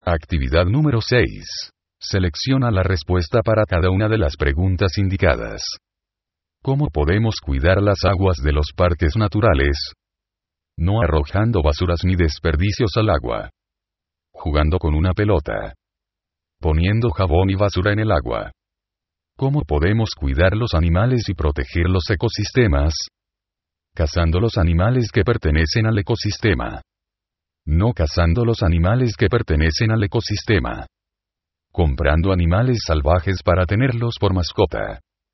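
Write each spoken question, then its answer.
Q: ¿Cómo podemos cuidar las aguas de los parques naturales?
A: No arrojando basuras ni desperdicios al agua.

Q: ¿Cómo podemos cuidar los animales y proteger los ecosistemas?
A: No cazando los animales que pertenecen al ecosistema.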